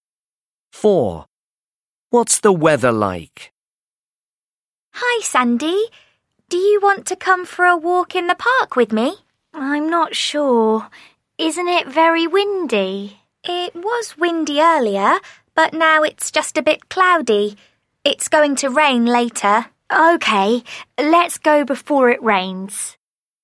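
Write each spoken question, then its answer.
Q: What's the weather like?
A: a bit cloudy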